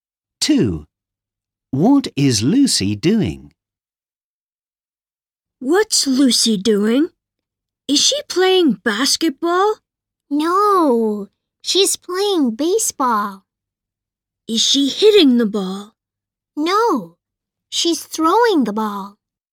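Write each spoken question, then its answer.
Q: What is Lucy doing?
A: throwing the ball (playing baseball)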